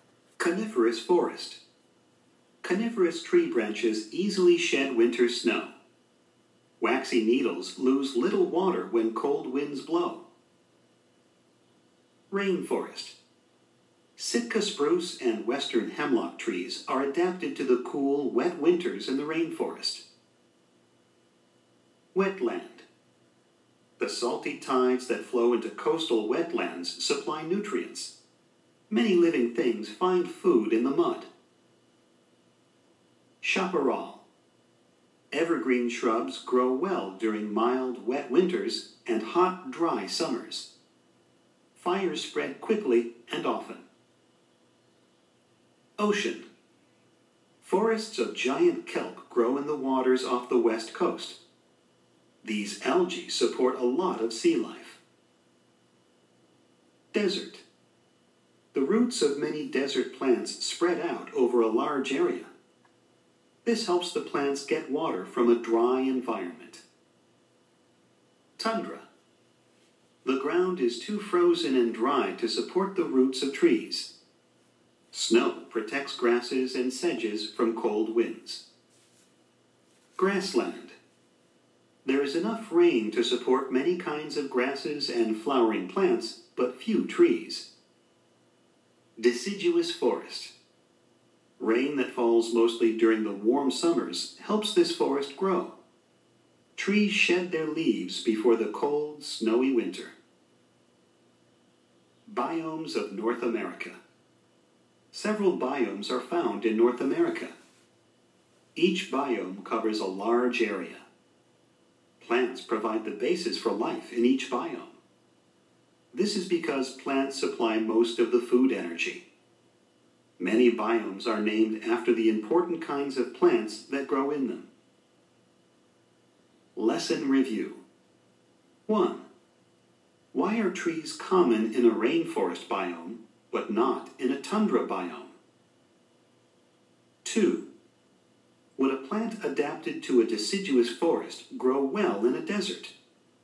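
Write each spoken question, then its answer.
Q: Why are trees common in a rainforest biome, but not in a tundra biome?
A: The rainforest is cool and wet, which supports trees, but tundra ground is too frozen and dry to support tree roots.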